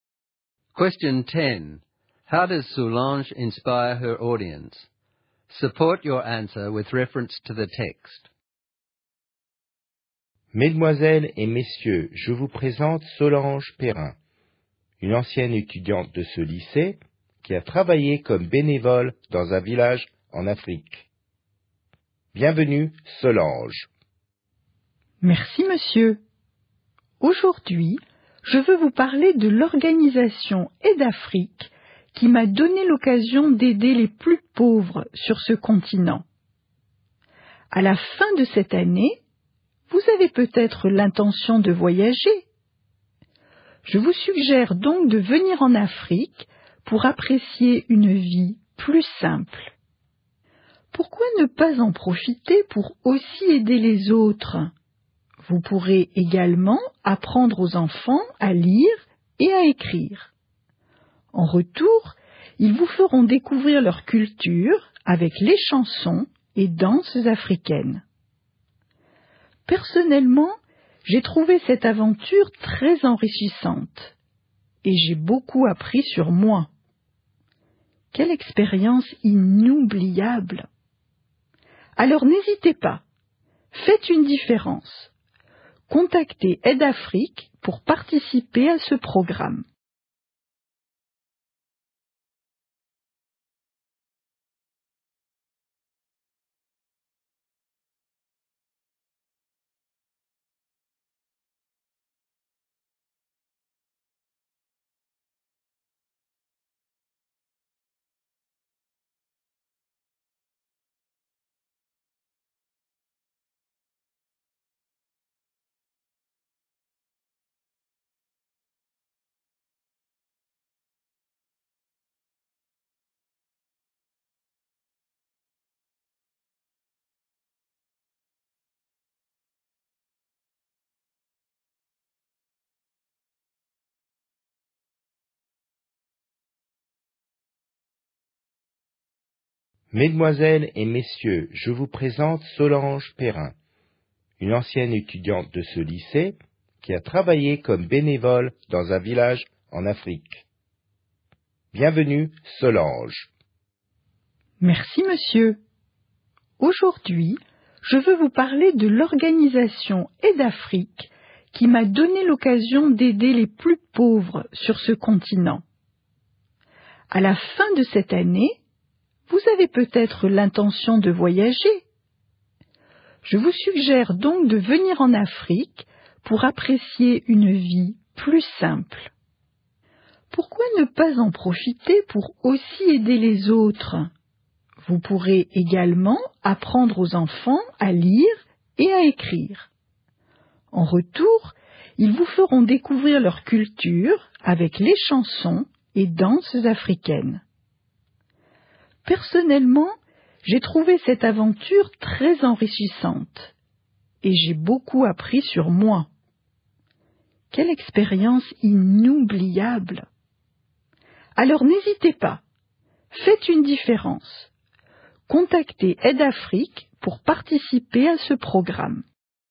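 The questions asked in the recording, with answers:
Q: How does Soulange inspire her audience?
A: She shares her own experience as a volunteer in Africa (enriching, unforgettable), suggests they travel to Africa, help others and teach children, and urges them to make a difference by contacting Aidafrique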